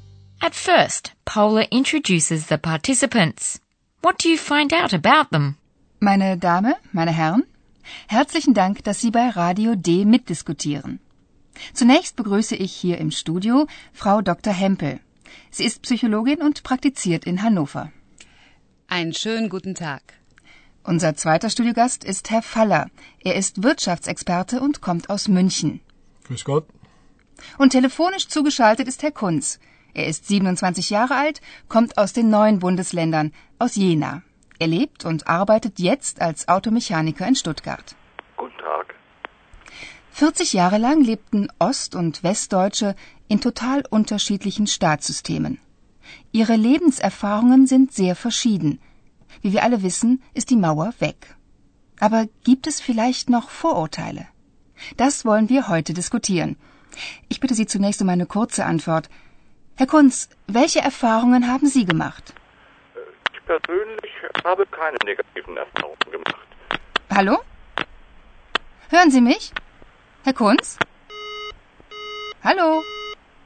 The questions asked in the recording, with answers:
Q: What do you find out about them?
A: First, Paula welcomes Frau Hempel, a psychologist who practices in the North German city of Hanover.